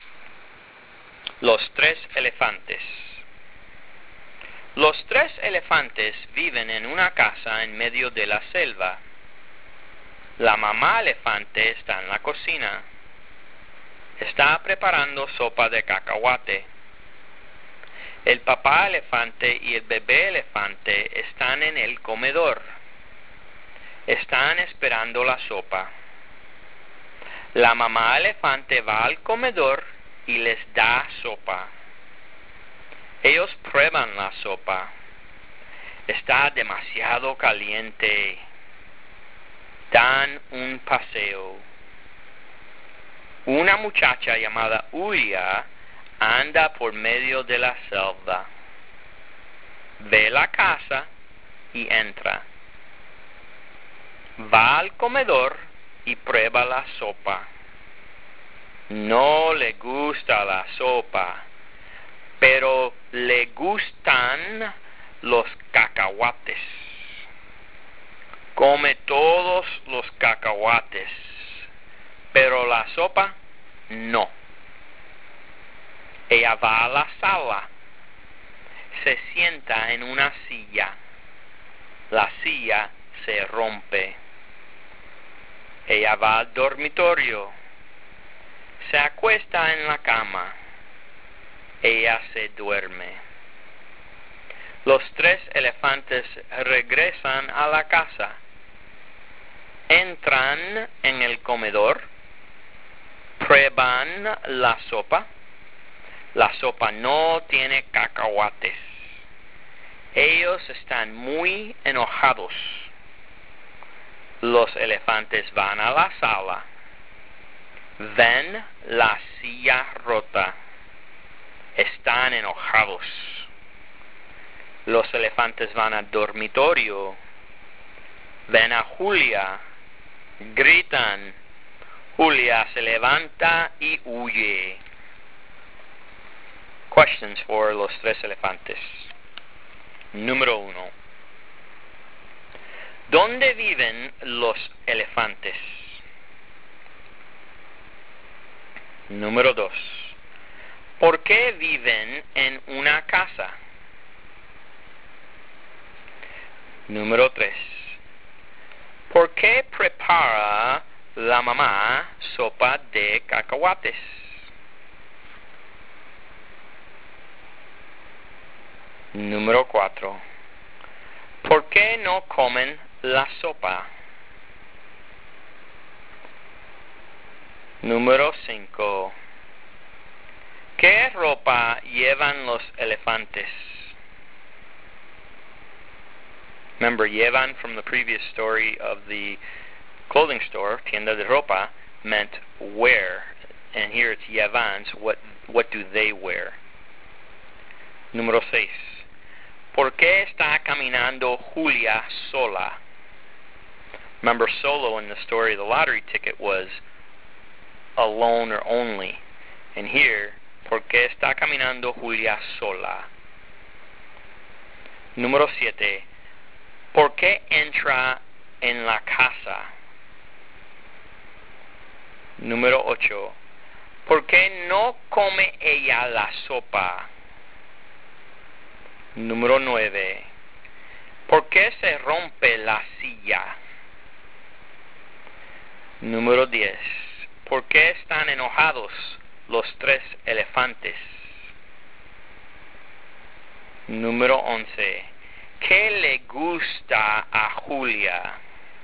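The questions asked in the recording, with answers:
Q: ¿Dónde viven los elefantes?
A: En una casa en medio de la selva

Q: ¿Por qué no comen la sopa?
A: Porque está demasiado caliente

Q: ¿Por qué no come ella la sopa?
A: Porque no le gusta la sopa

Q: ¿Por qué están enojados los tres elefantes?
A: Porque la sopa no tiene cacahuates y la silla está rota

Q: ¿Qué le gusta a Julia?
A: Los cacahuates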